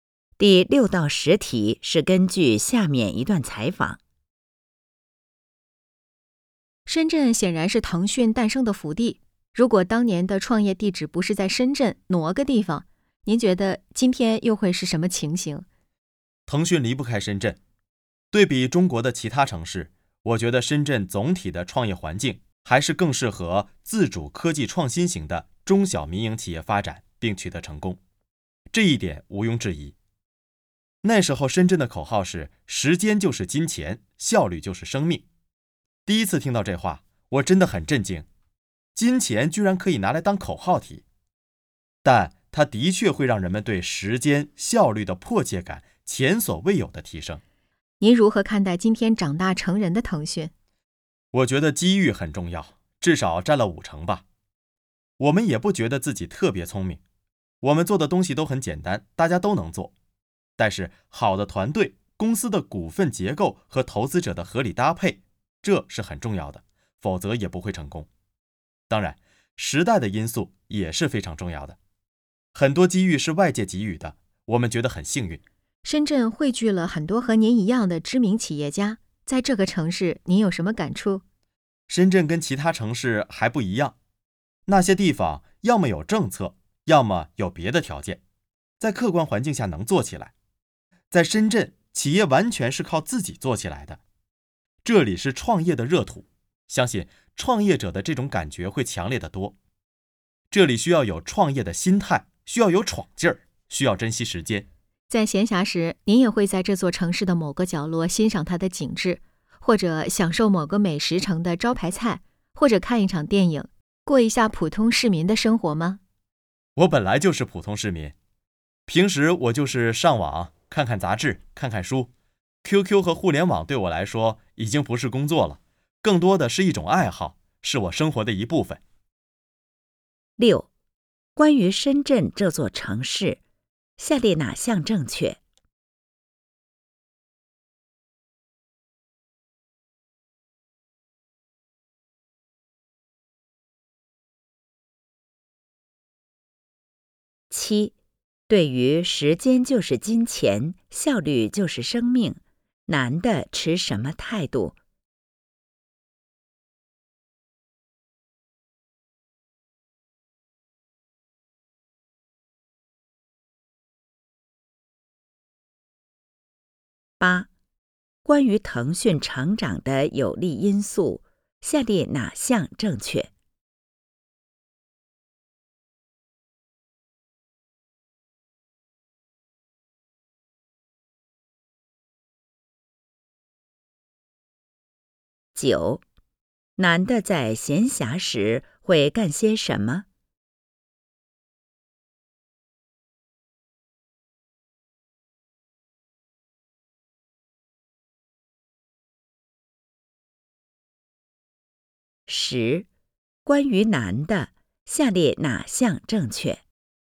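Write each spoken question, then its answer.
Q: 男的在闲暇时会干些什么?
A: 上网,看杂志,看书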